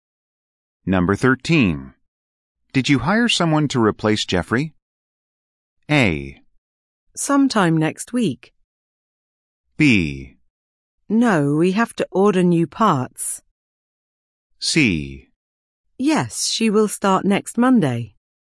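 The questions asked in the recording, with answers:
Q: Did you hire someone to replace Jeffrey?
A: C: Yes, she will start next Monday.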